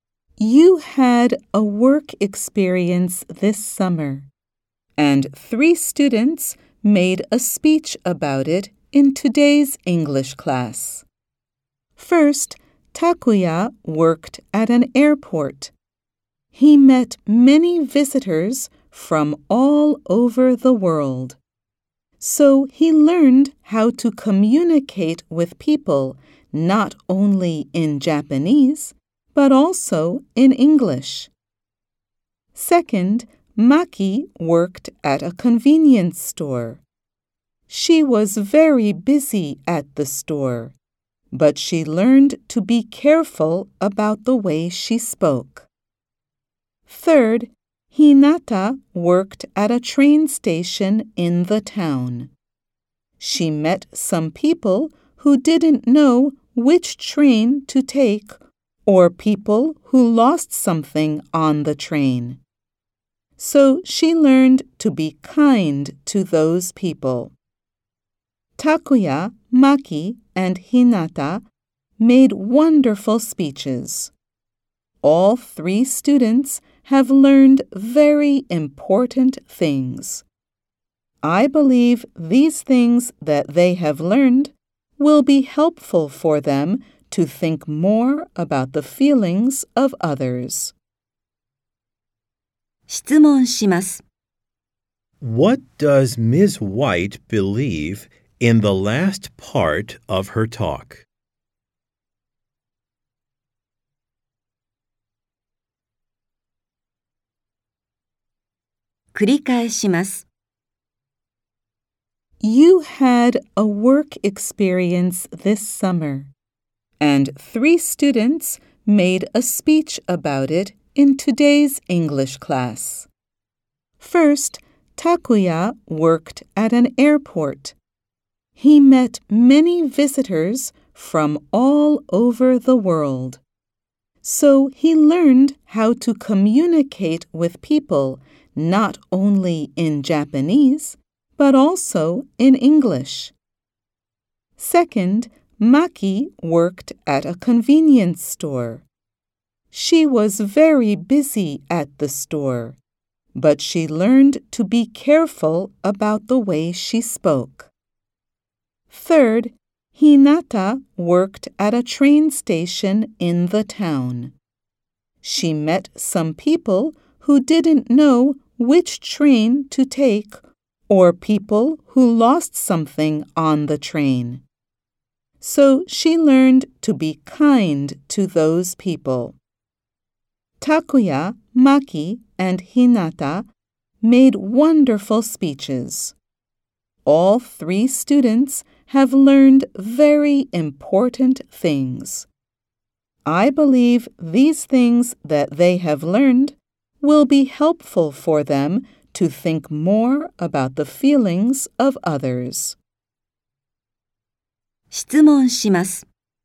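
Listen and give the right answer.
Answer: That what the students have learned will help them think more about the feelings of others.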